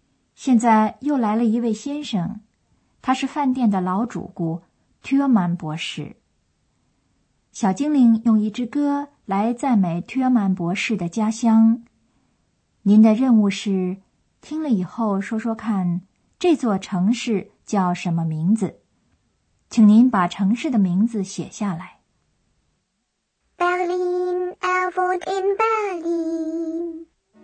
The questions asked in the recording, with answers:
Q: 您的任务是听了以后说说看这座城市叫什么名字,请您把城市的名字写下来。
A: 要找的第五个词是 Berlin 这座城市